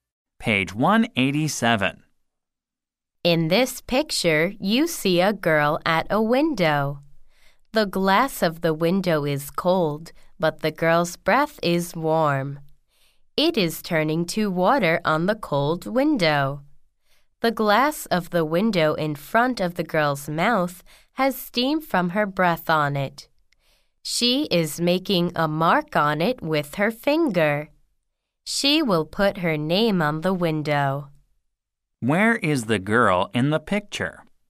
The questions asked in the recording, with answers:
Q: Where is the girl in the picture?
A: In the picture, the girl is at a window.